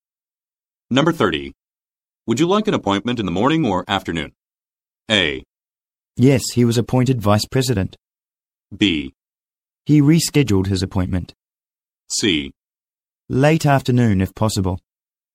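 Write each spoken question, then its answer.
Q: Would you like an appointment in the morning or afternoon?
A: C: Late afternoon, if possible.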